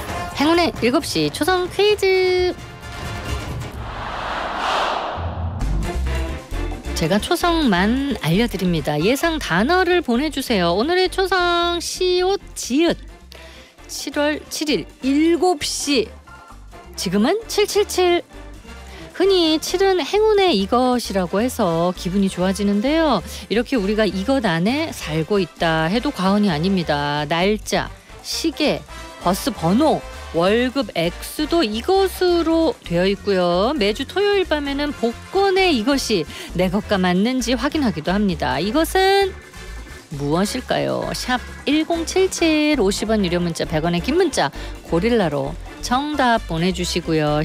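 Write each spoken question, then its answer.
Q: 이것은 무엇일까요?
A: 숫자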